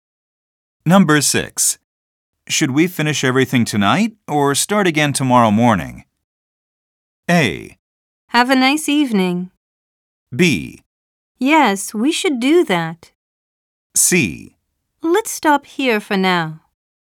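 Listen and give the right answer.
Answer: C: Let's stop here for now.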